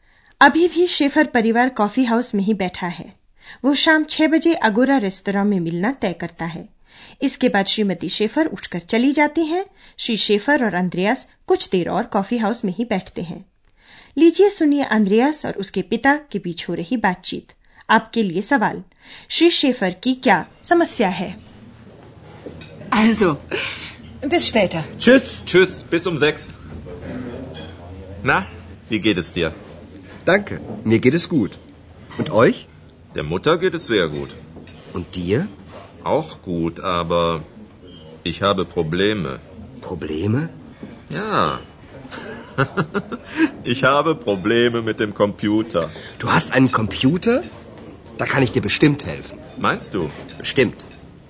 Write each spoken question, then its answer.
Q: श्री Schafer की क्या समस्या है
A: उनकी समस्या computer से संबंधित है